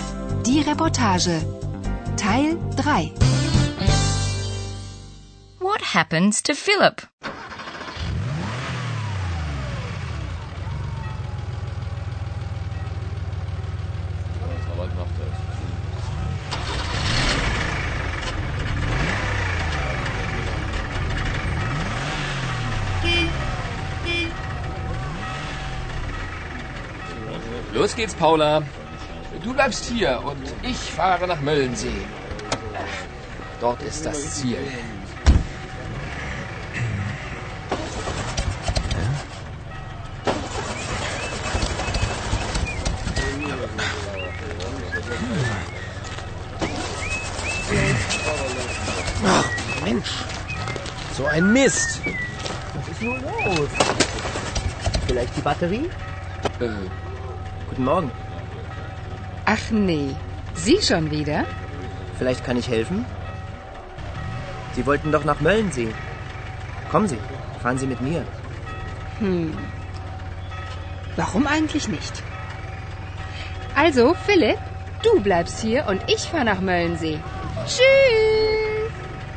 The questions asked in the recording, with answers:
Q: What happens to Philip?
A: His car won't start.